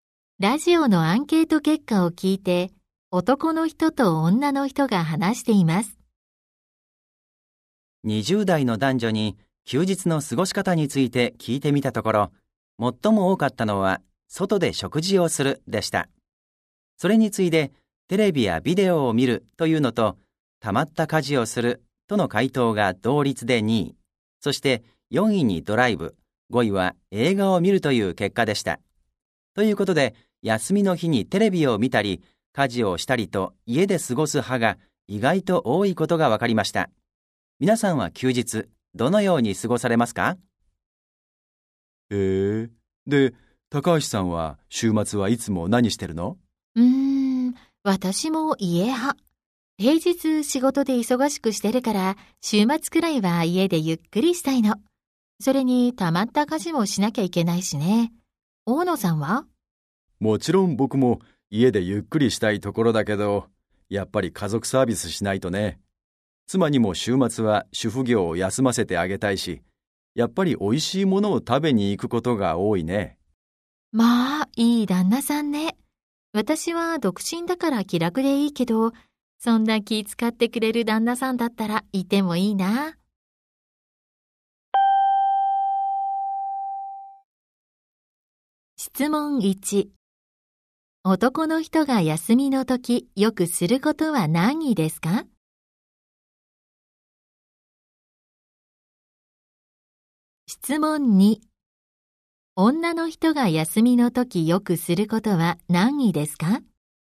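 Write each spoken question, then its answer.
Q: 男の人が休みの時よくすることは何ですか?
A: 外で食事をする(おいしいものを食べに行く)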